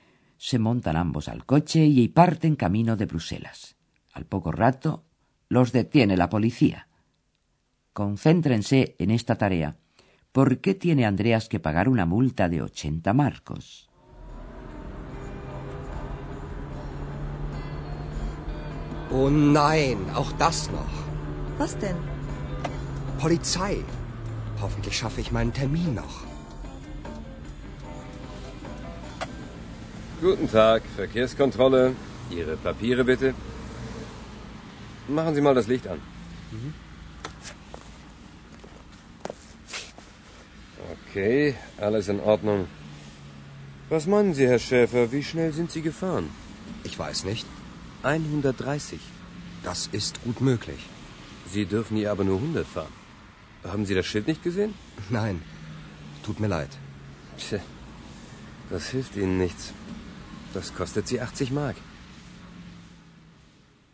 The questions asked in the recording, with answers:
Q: ¿Por qué tiene Andreas que pagar una multa de 80 marcos?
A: Andreas tiene que pagar una multa de 80 marcos porque iba conduciendo a excesiva velocidad.